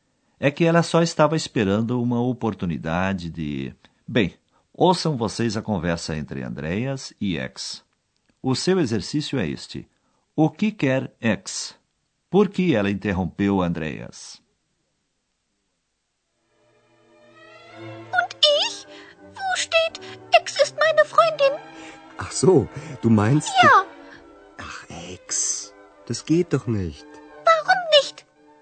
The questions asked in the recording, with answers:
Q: O que quer X?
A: Ex acha que Andreas deveria escrever sobre ela.